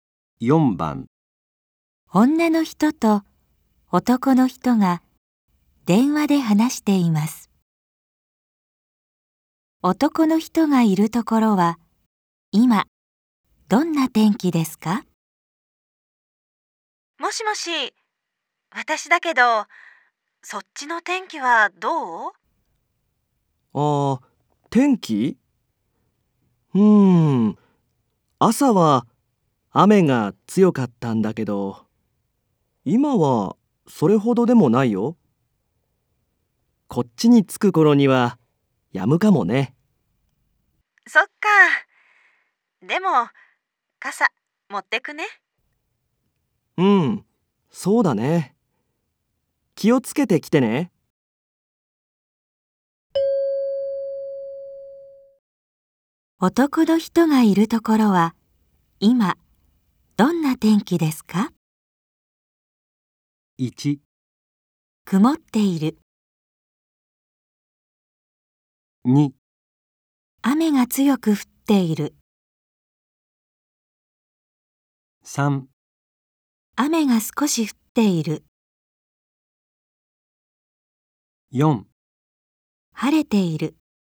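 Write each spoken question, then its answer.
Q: 男の人がいるところは今どんな天気ですか?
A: 3: 雨が少し降っている。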